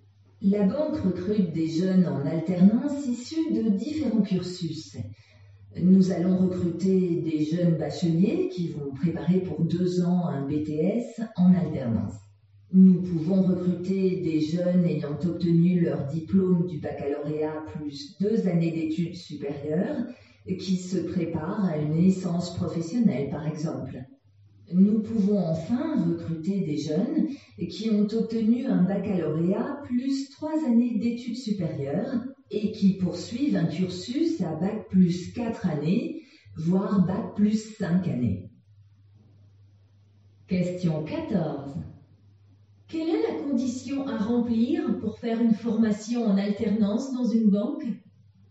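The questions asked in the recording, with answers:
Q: Quelle est la condition à remplir pour faire une formation en alternance dans une banque ?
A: Avoir au moins le baccalauréat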